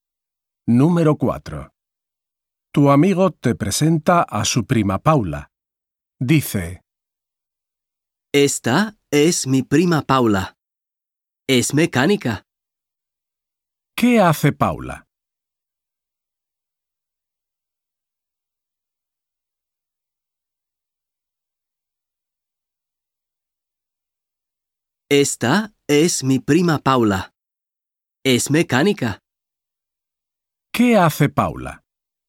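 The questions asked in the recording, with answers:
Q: ¿Qué hace Paula?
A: Es mecánica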